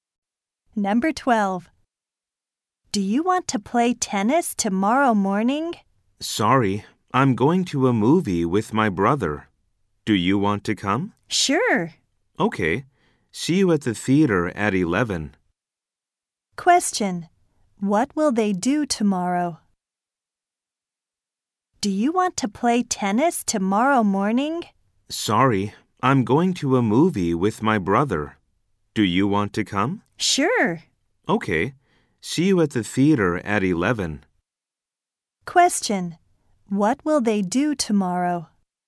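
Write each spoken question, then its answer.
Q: What will they do tomorrow?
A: Go to a movie.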